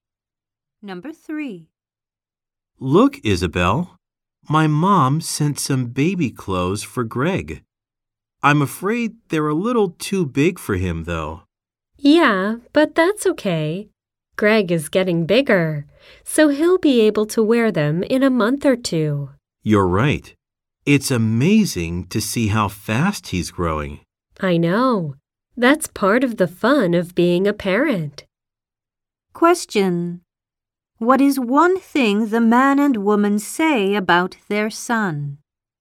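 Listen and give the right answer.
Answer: He is growing fast.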